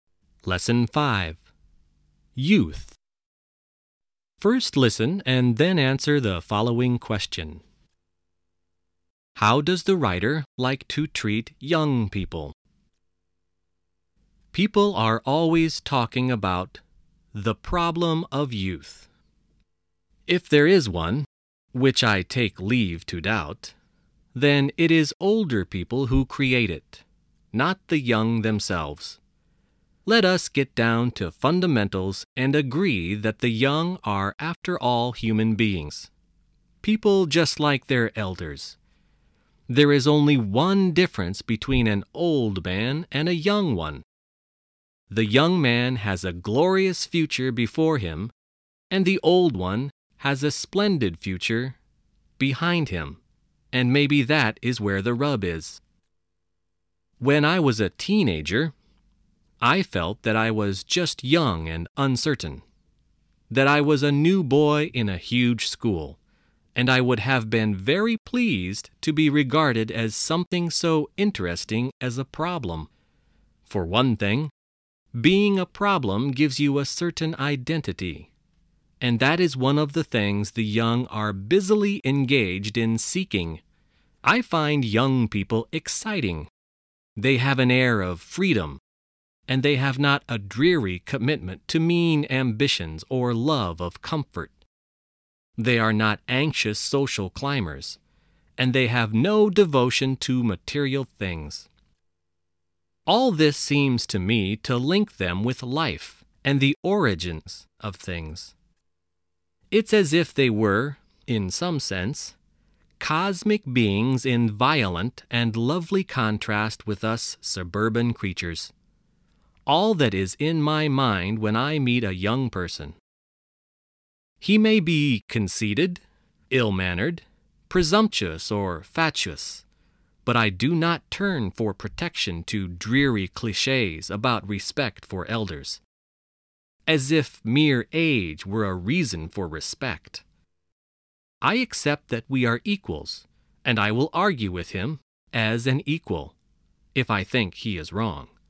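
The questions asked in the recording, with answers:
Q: How does the writer like to treat young people?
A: As equals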